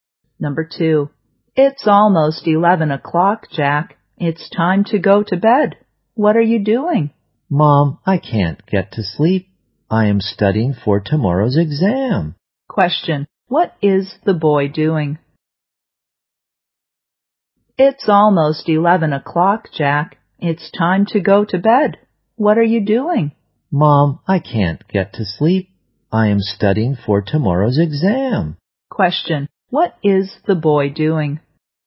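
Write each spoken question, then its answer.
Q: what is the boy doing?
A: Studying for tomorrow's exam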